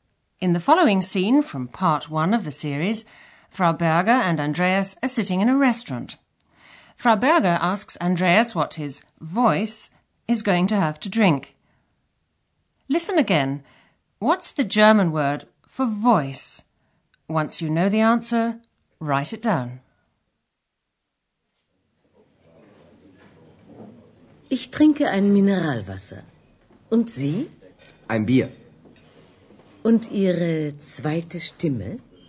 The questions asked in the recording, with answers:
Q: What's the German word for voice?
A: The answer is Stimme.